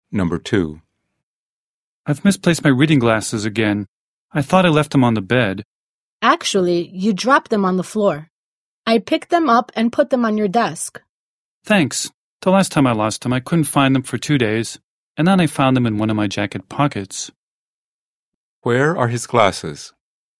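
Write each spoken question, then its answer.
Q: Where are his glasses?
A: On his desk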